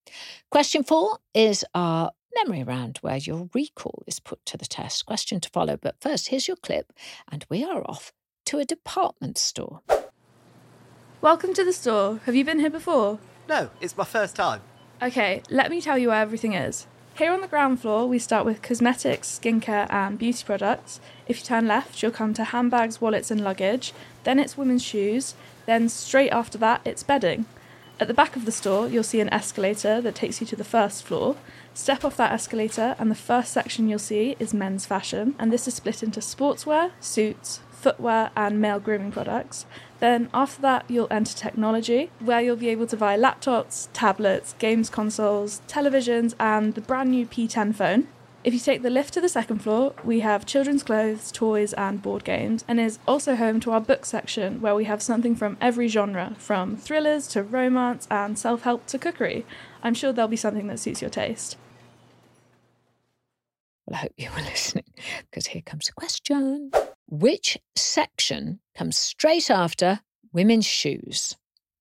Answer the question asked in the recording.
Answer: The answer was bedding.